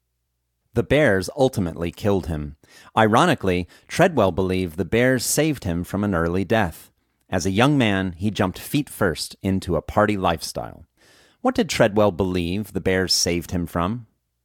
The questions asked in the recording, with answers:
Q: What did Treadwell believe the bears saved him from?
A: Treadwell believed the bears saved him from an early death.